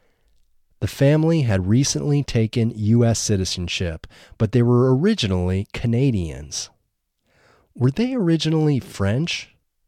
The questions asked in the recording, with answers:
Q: Were they originally French?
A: No, they weren't originally French.